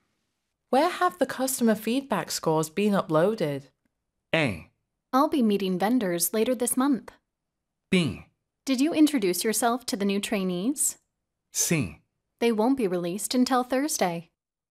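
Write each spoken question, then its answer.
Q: Where have the customer feedback scores been uploaded?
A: C: They won't be released until Thursday.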